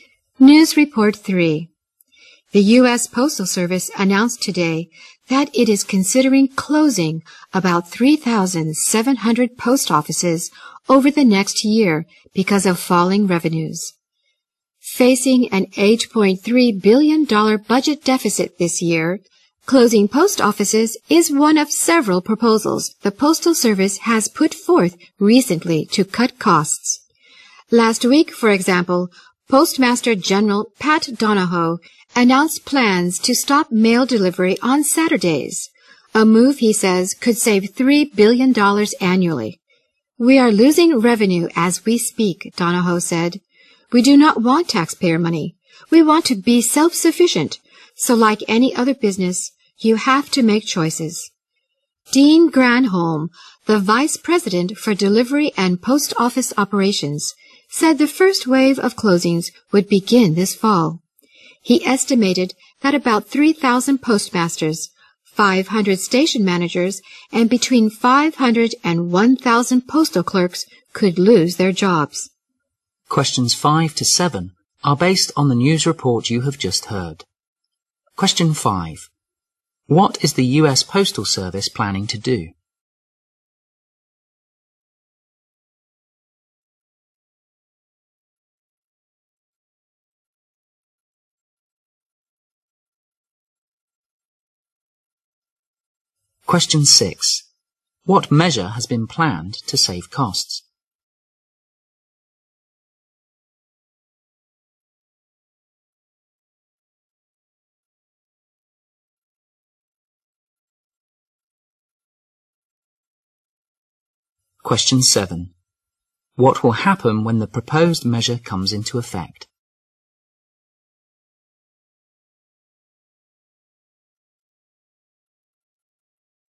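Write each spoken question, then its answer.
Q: What is the U.S. Postal Service planning to do?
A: Close about 3,700 post offices

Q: What measure has been planned to save costs?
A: Stop mail delivery on Saturdays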